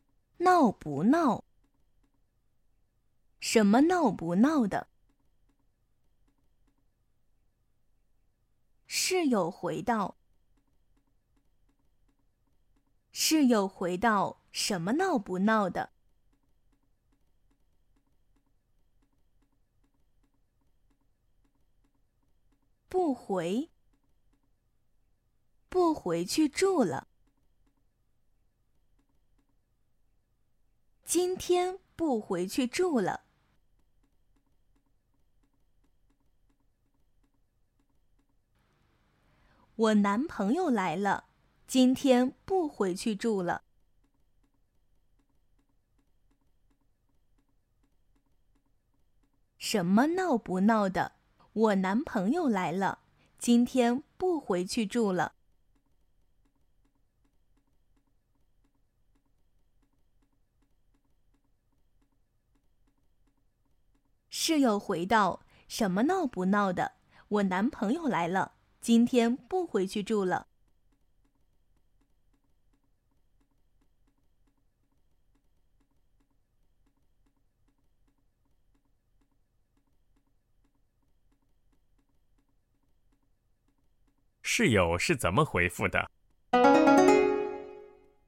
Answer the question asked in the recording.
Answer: 室友回到:"什么闹不闹的?我男朋友来了,今天不回去住了。"